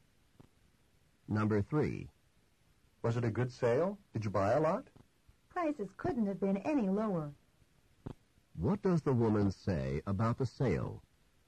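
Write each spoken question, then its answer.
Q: What does the woman say about the sale?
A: Prices were extremely low.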